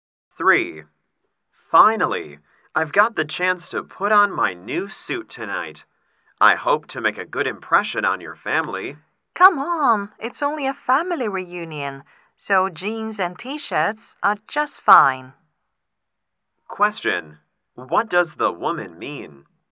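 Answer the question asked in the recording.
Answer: He doesn't need to dress formally; casual clothes are fine.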